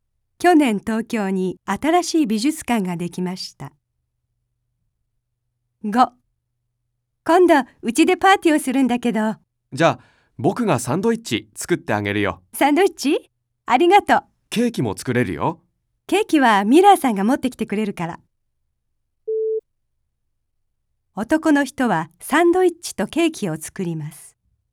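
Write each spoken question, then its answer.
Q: 男の人はサンドイッチとケーキを作ります。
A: ×(間違い)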